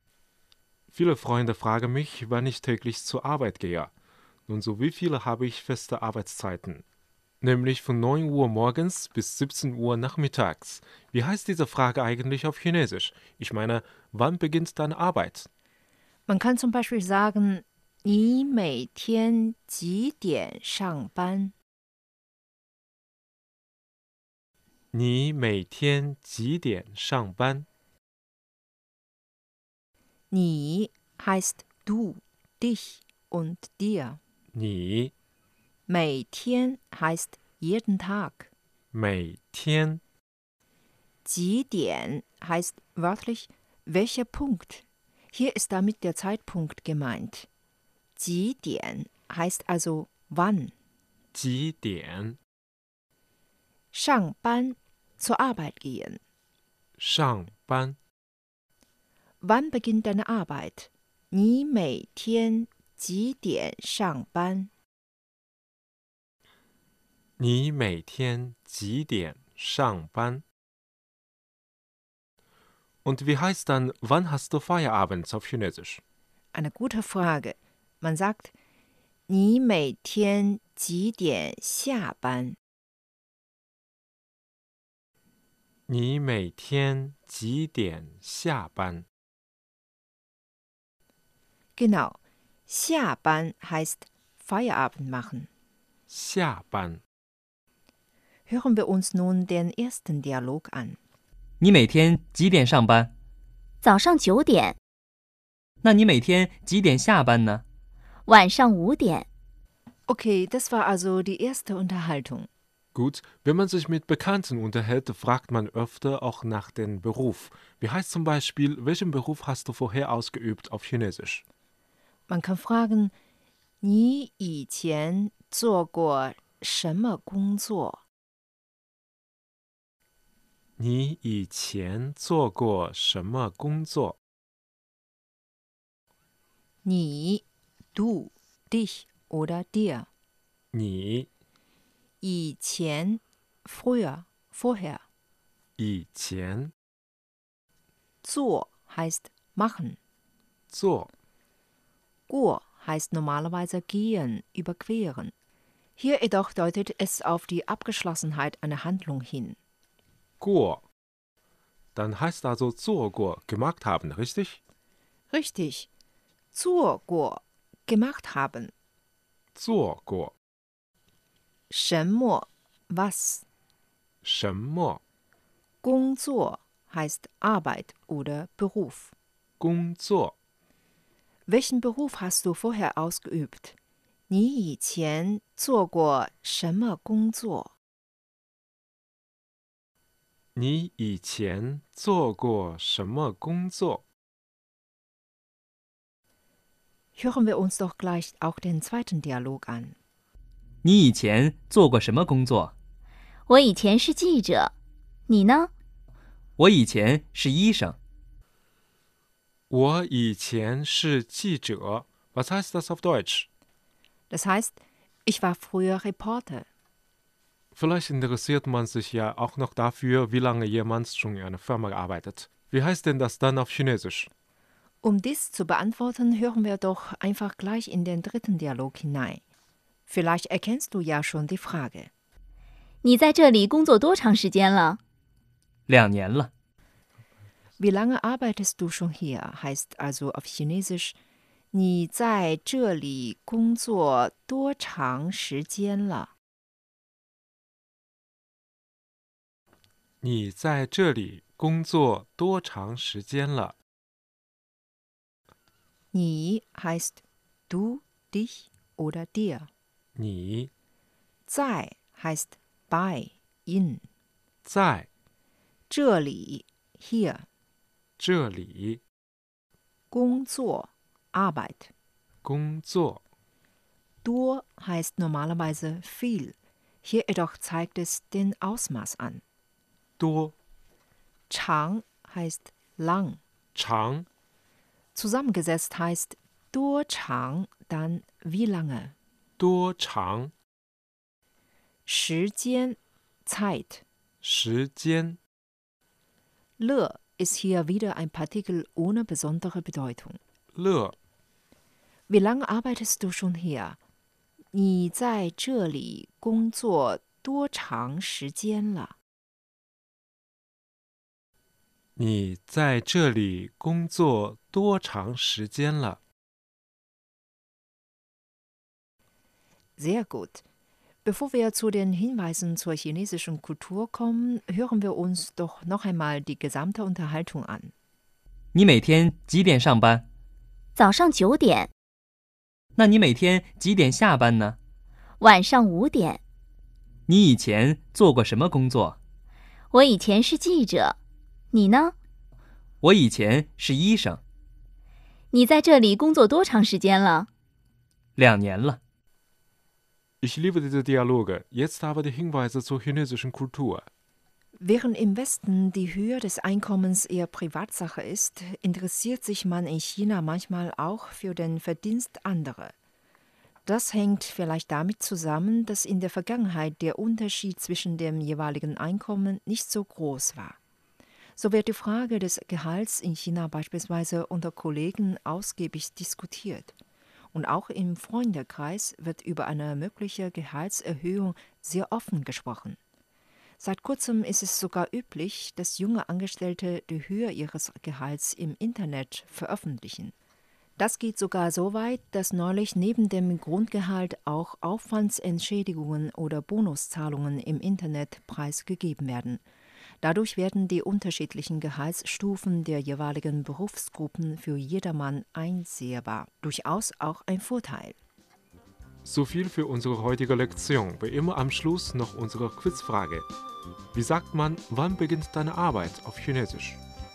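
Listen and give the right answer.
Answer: 你每天几点上班?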